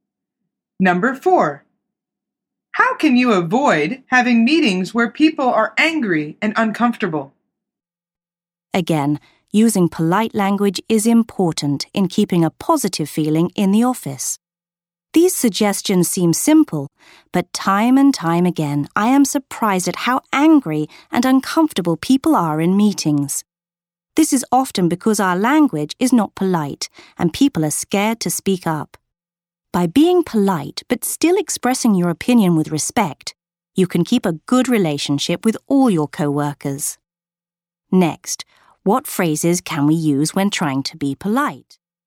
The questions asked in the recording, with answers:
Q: How can you avoid having meetings where people are angry and uncomfortable?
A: The answer is by being polite.